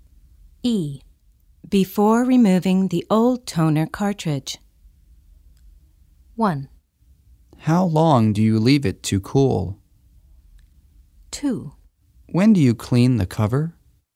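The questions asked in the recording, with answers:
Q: Before removing the old toner cartridge.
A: 2: When do you clean the cover?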